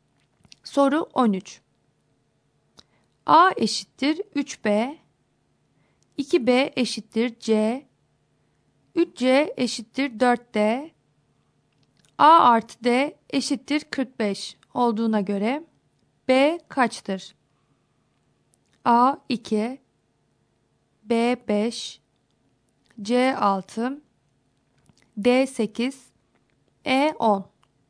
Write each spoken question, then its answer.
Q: A eşittir 3B, 2B eşittir C, 3C eşittir 4D, A artı D eşittir 45 olduğuna göre B kaçtır?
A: Doğru cevap E şıkkı.